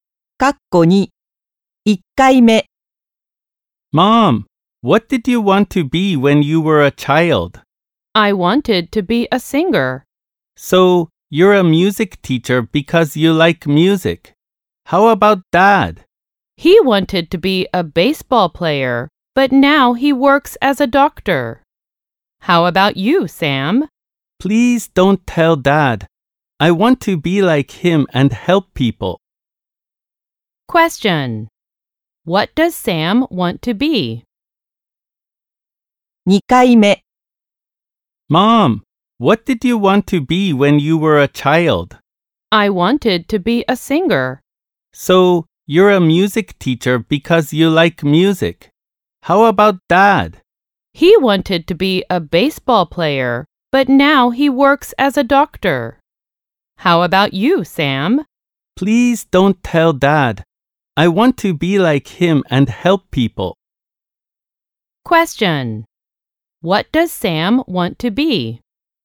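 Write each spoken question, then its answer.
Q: What does Sam want to be?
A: A doctor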